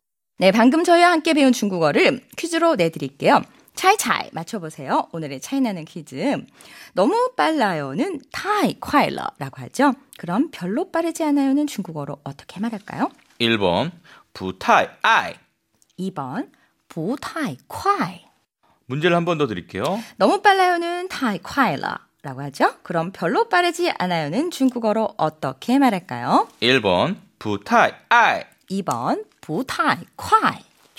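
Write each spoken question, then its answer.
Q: 그럼 별로 빠르지 않아요는 중국어로 어떻게 말할까요?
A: 2: 부타이 콰이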